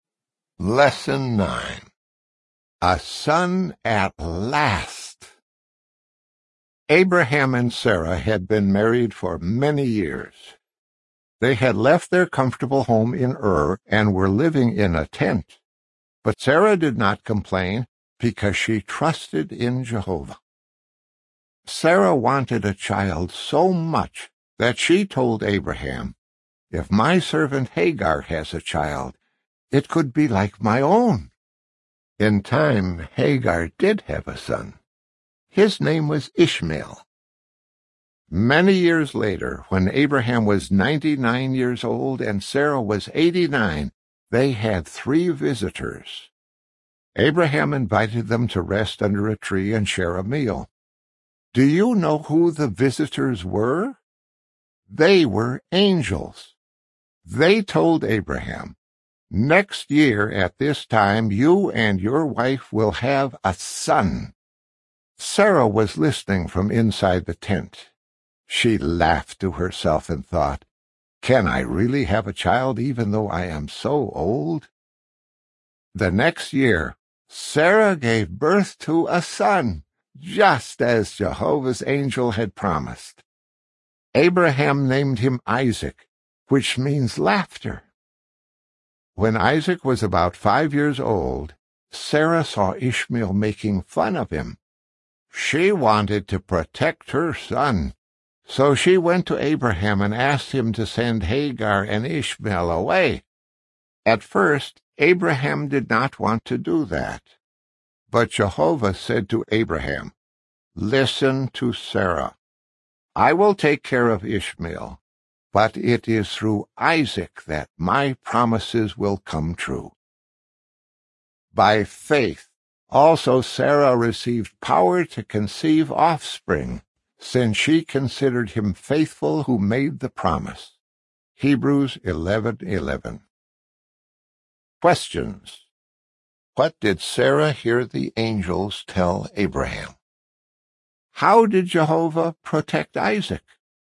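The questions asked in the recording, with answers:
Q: What did Sarah hear the angels tell Abraham?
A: That next year at this time, Abraham and his wife would have a son.

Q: How did Jehovah protect Isaac?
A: He told Abraham to listen to Sarah and send Hagar and Ishmael away, and said his promises would come true through Isaac.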